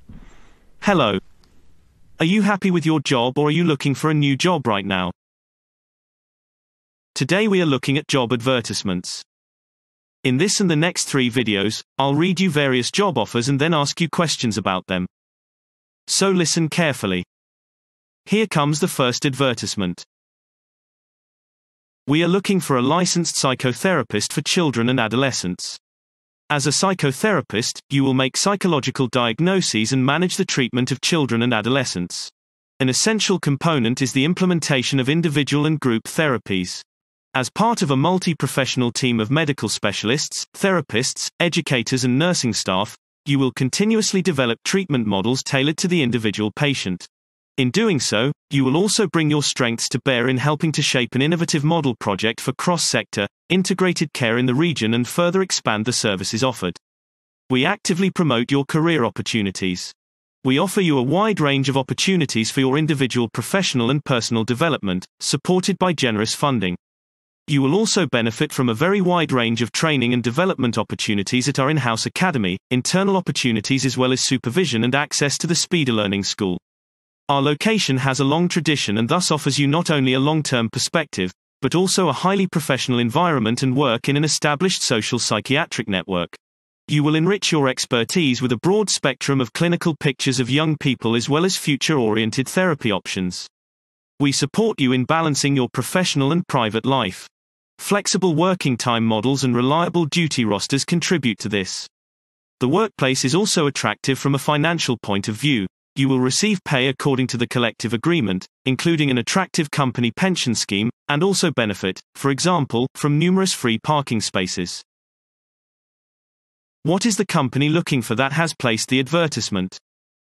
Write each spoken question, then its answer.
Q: What is the company looking for that has placed the advertisement?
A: They are looking for a licensed psychotherapist for children and adolescents.